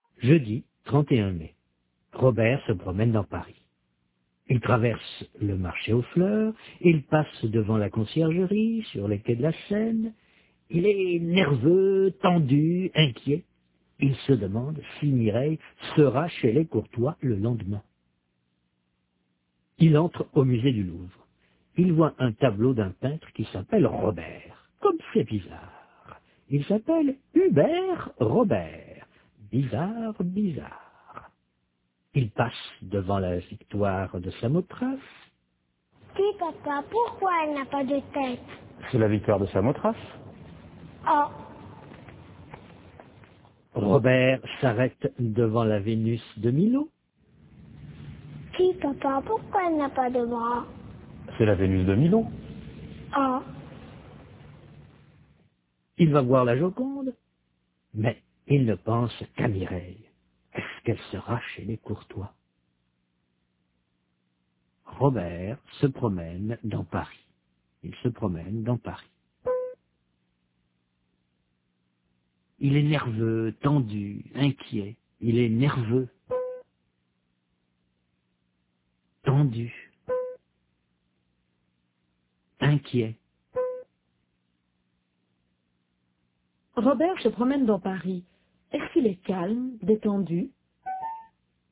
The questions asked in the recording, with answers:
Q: Est-ce qu'il est calme, détendu?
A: Non, il est nerveux, tendu, inquiet.